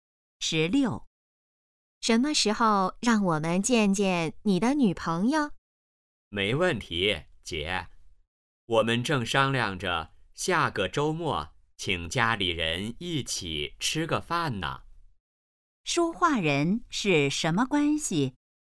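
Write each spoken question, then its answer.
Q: 说话人是什么关系?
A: 姐弟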